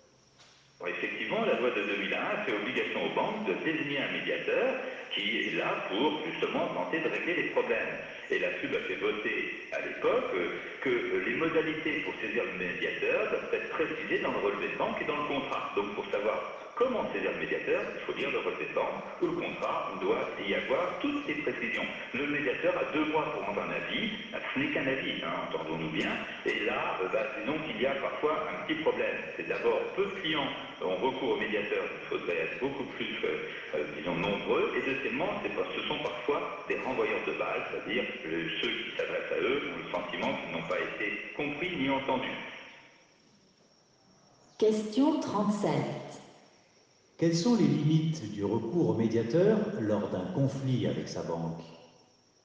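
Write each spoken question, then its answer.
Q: Quelles sont les limites du recours au médiateur lors d'un conflit avec sa banque?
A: Il ne rend qu'un avis, peu de clients y ont recours, et il renvoie parfois la balle : les clients ne se sentent ni compris ni entendus.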